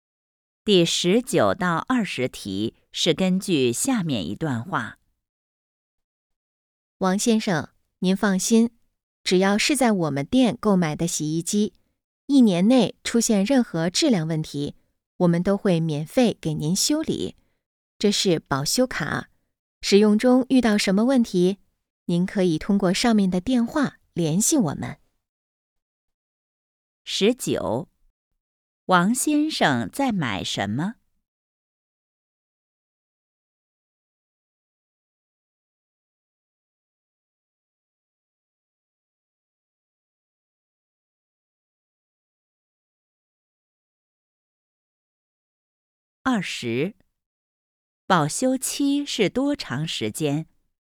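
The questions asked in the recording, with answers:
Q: 王先生在买什么?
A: 洗衣机

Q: 保修期是多长时间?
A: 一年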